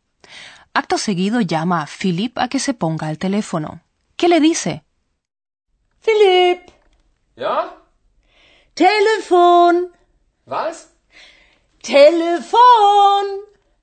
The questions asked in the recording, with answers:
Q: ¿Qué le dice?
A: Está claro. Frau Frisch le dice en voz alta, teléfono.